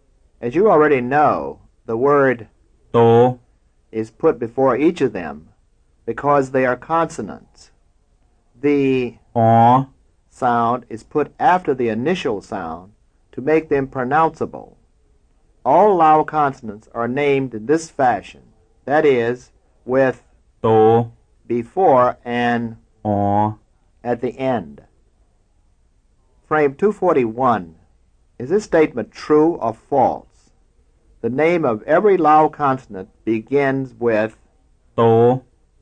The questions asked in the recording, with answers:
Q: Is this statement true or false? The name of every Lao consonant begins with to.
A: That's true.